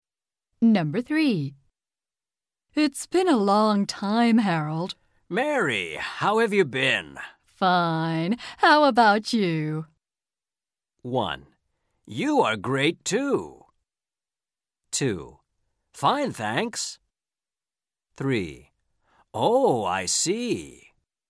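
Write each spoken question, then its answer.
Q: Fine. How about you?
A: 2: Fine, thanks.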